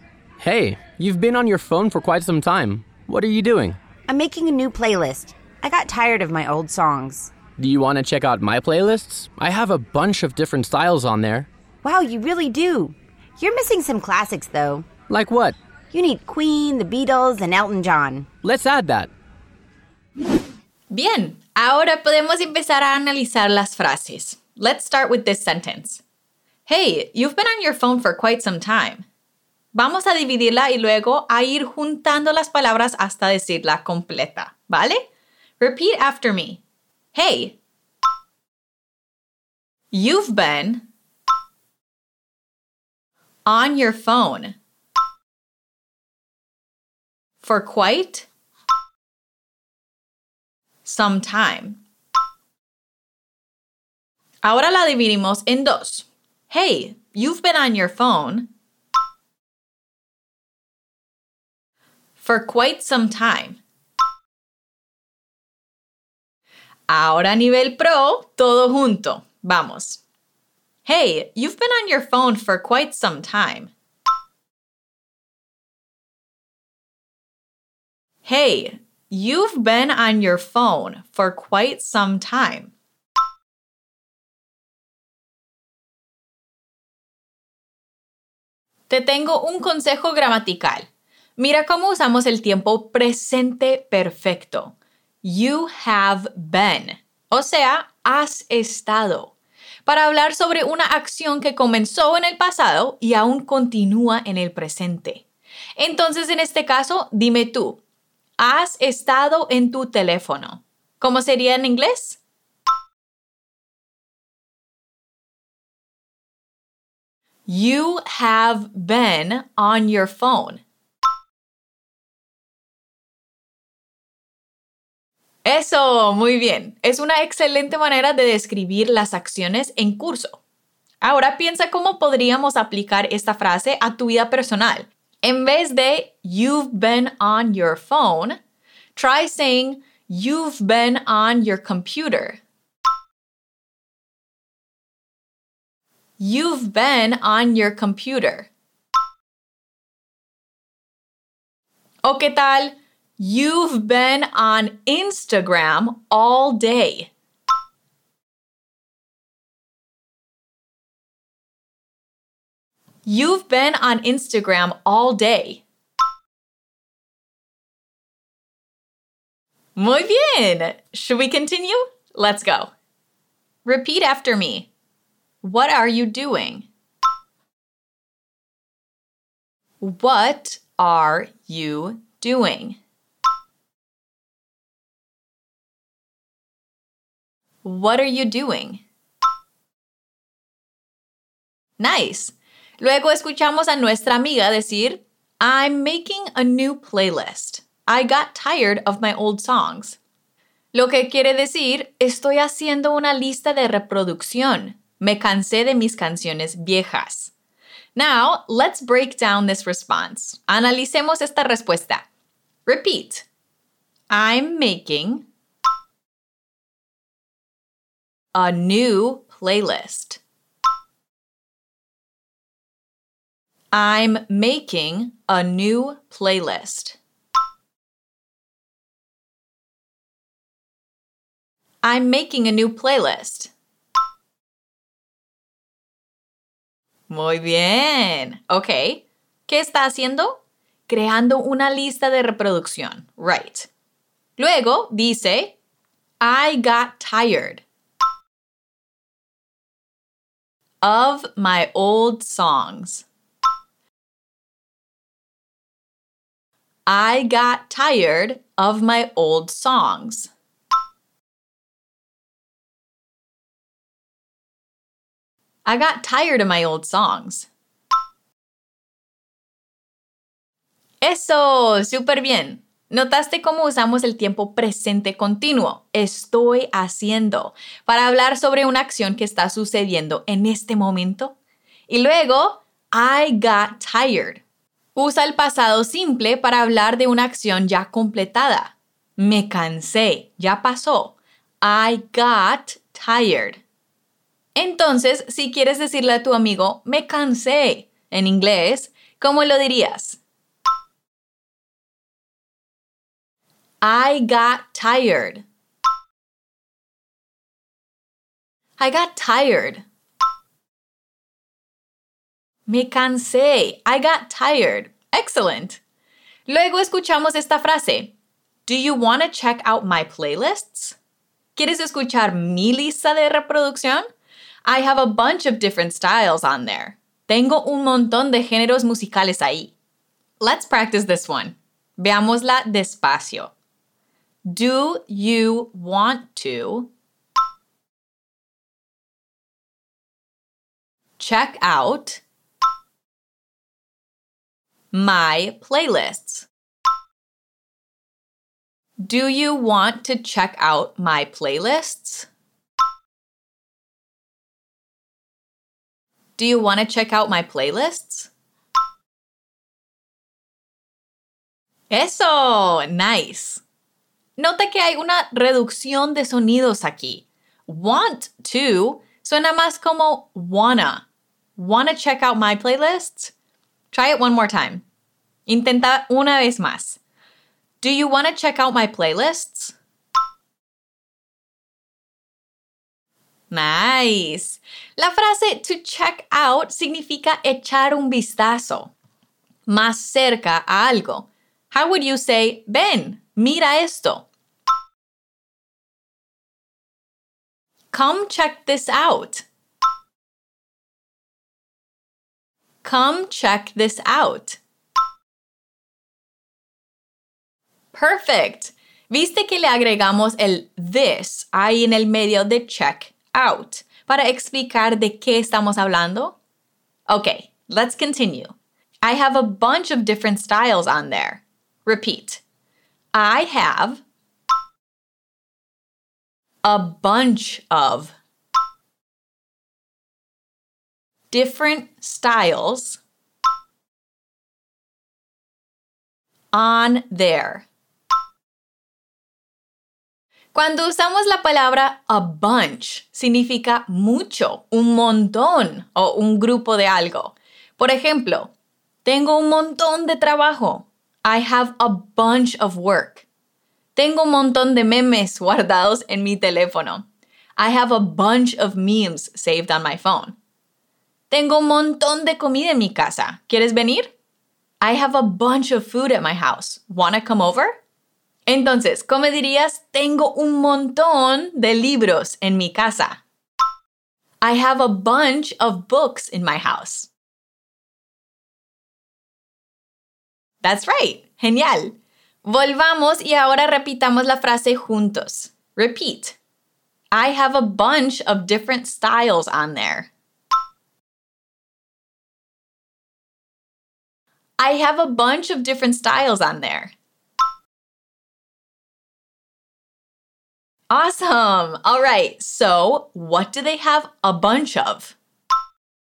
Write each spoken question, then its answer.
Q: So, what do they have a bunch of?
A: Styles on there styles of music on their playlist, estilos de música o géneros musicales.